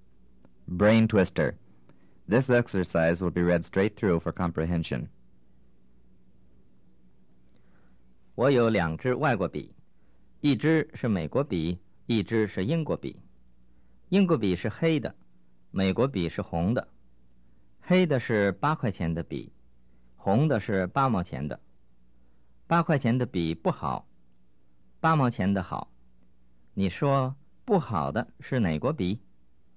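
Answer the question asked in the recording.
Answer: 英国笔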